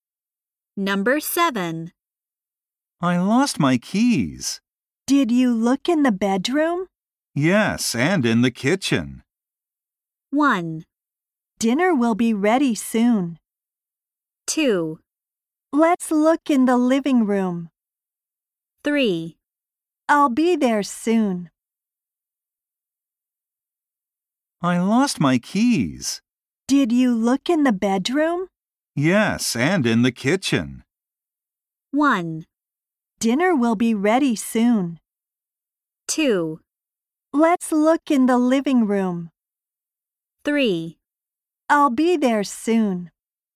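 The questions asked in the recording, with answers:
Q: Yes, and in the kitchen.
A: 2: Let's look in the living room.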